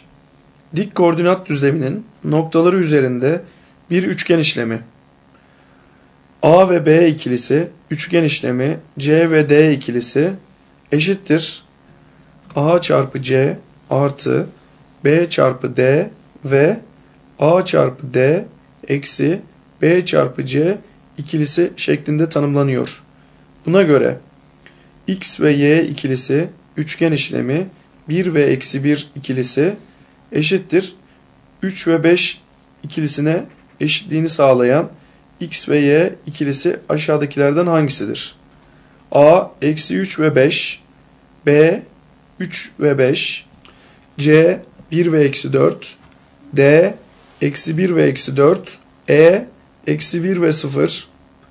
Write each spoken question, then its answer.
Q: Buna göre X ve Y ikilisi üçgen işlemi 1 ve eksi 1 ikilisi eşittir 3 ve 5 ikilisine eşitliğini sağlayan x ve y ikilisi aşağıdakilerden hangisidir?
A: Doğru cevap D eksi 1 ve eksi 4.